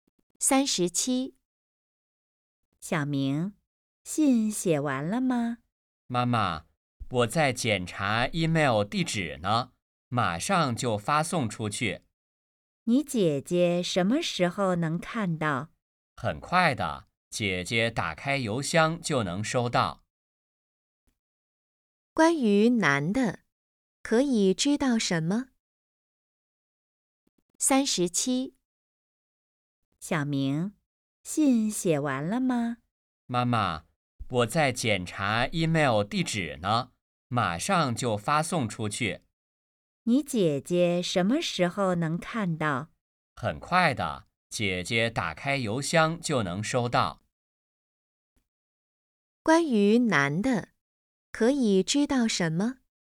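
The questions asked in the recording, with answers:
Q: 关于男的,可以知道什么?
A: 在给姐姐发email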